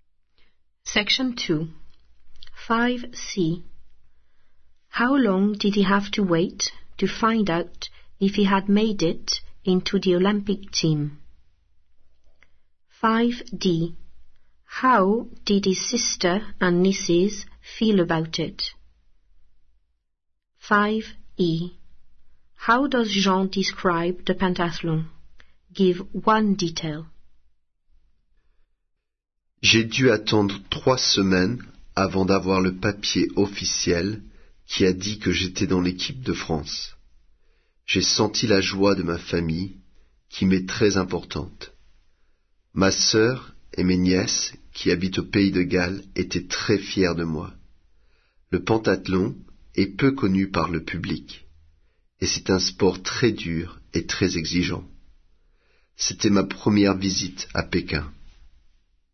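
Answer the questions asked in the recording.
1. 3 weeks
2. Very proud
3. Little known by the public; very hard and demanding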